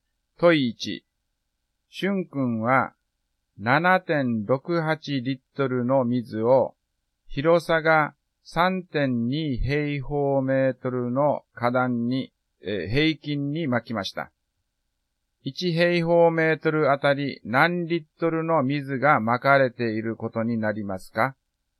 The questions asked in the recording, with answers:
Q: 1平方メートルあたり何リットルの水が撒かれていることになりますか?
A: 7.68 リットル割る 3.2 平方メートルになります。